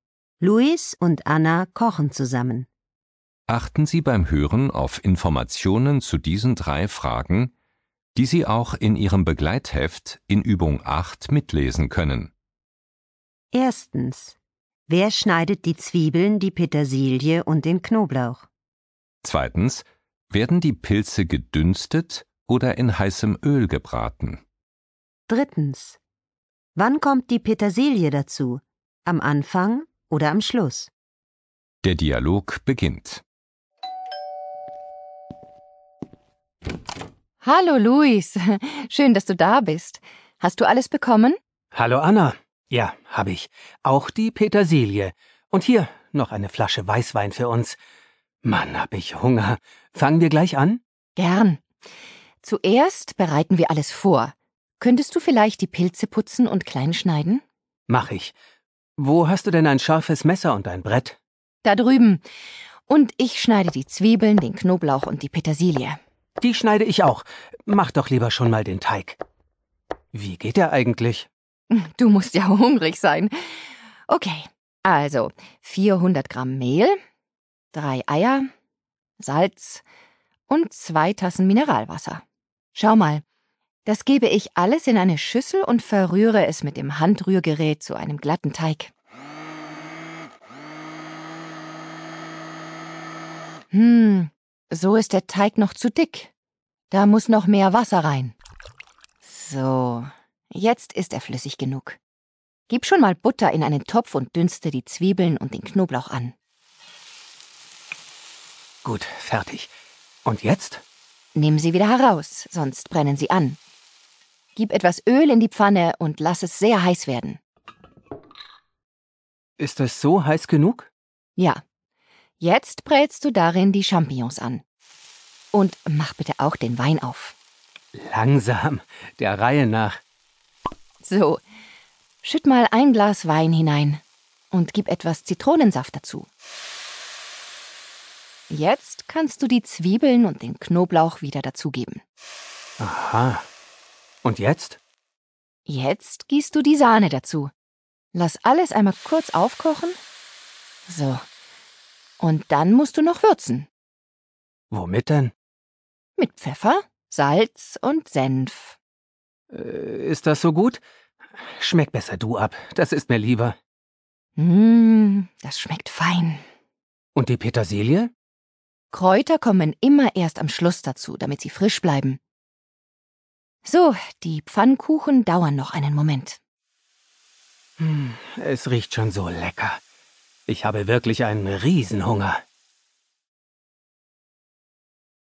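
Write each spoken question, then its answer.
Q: Werden die Pilze gedünstet oder in heißem Öl gebraten?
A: In heißem Öl gebraten

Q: Wann kommt die Petersilie dazu?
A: Am Schluss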